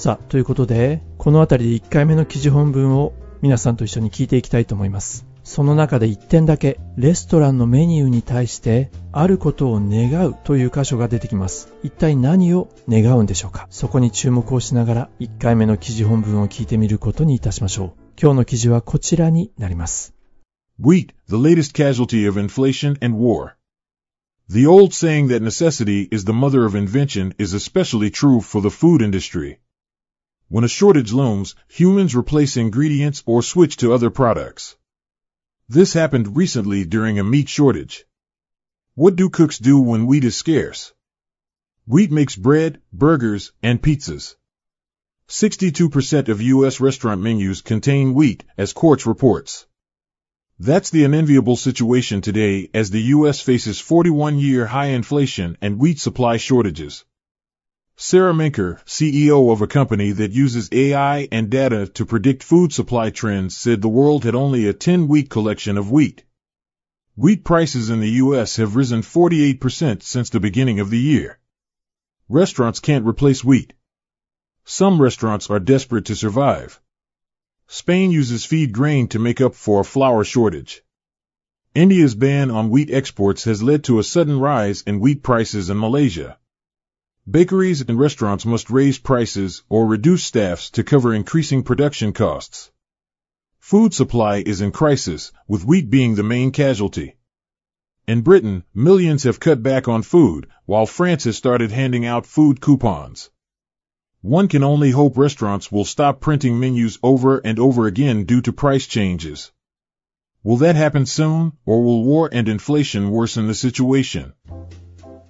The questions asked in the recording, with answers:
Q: 一体何を願うんでしょうか?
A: レストランがメニューを何度も何度も印刷するのをやめることを願う。